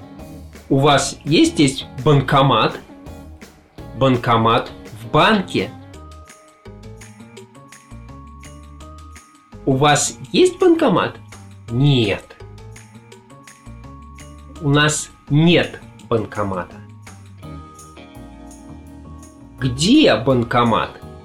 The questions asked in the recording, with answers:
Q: Где банкомат?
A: В банке.